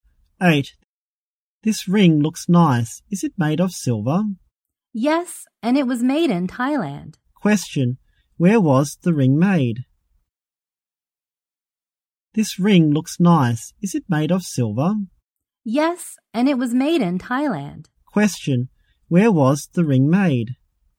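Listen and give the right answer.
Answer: In Thailand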